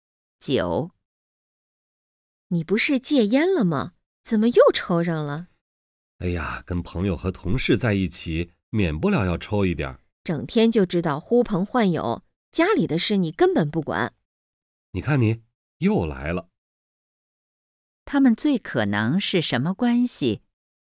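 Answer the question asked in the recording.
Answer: 夫妻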